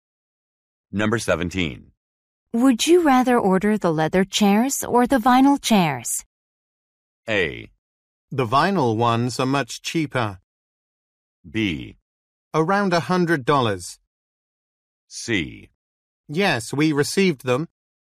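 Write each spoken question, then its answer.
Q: Would you rather order the leather chairs or the vinyl chairs?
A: A: The vinyl ones are much cheaper.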